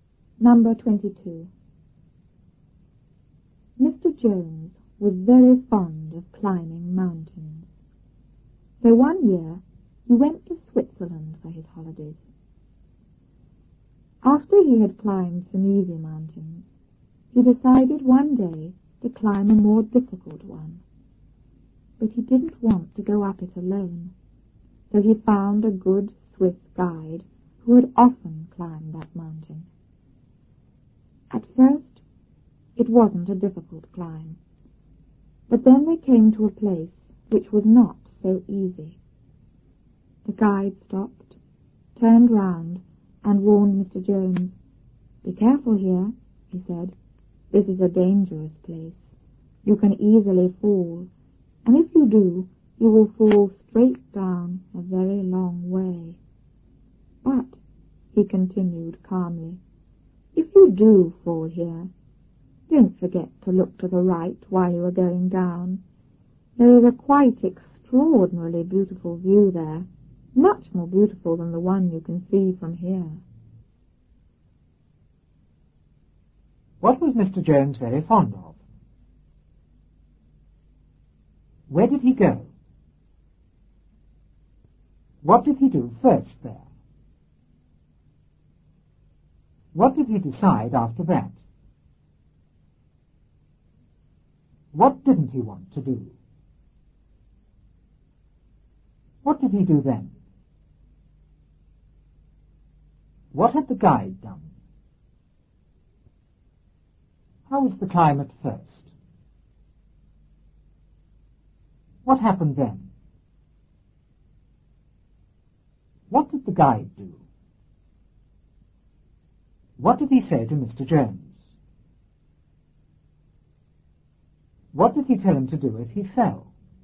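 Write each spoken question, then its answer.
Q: What was Mr. Jones very fond of?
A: Climbing mountains

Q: Where did he go?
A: To Switzerland for his holidays

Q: What did he do first there?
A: He climbed some easy mountains

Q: What did he decide after that?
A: To climb a more difficult mountain

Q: What didn't he want to do?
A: Go up it alone

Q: What did he do then?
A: He found a good Swiss guide

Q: What had the guide done?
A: He had often climbed that mountain

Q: How was the climb at first?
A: It wasn't difficult

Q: What happened then?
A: They came to a place which was not so easy

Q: What did the guide do?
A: He stopped, turned round and warned Mr. Jones

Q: What did he say to Mr. Jones?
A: Be careful, this is a dangerous place

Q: What did he tell him to do if he fell?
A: Look to the right at the beautiful view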